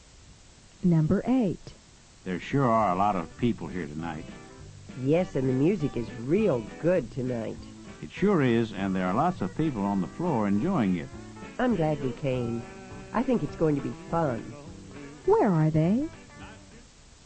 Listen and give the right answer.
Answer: Number 8 is B. They are at a club.